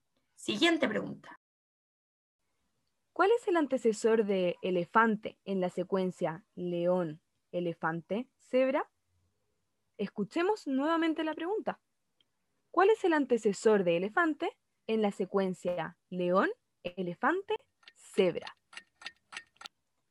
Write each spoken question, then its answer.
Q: ¿Cuál es el antecesor de elefante en la secuencia león, elefante, cebra?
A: La respuesta era león